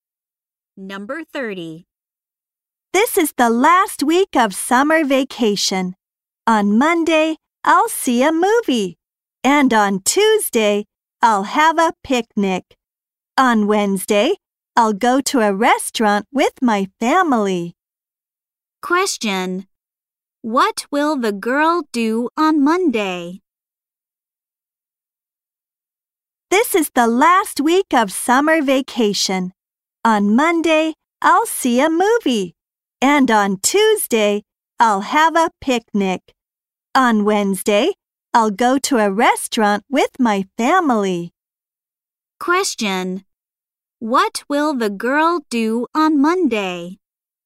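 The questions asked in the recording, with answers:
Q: What will the girl do on Monday?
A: See a movie.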